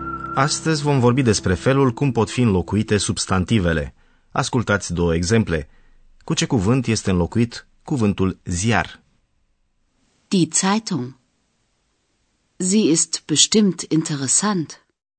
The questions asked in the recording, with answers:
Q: cu ce cuvânt este înlocuit cuvântul ziar?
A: Cuvântul ziar este înlocuit prin pronumele zi.